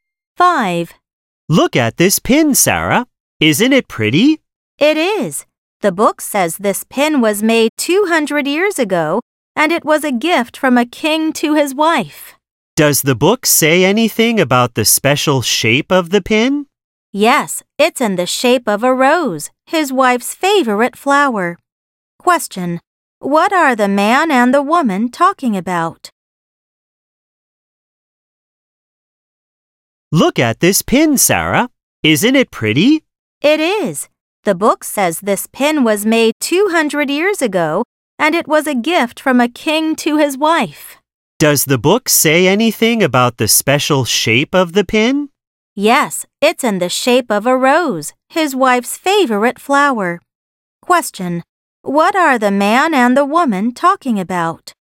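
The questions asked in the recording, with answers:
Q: What are the man and the woman talking about?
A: A pin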